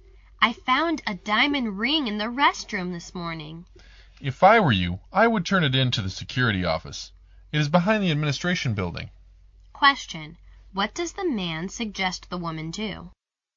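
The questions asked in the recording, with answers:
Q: What does the man suggest the woman do?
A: Take the ring to the security office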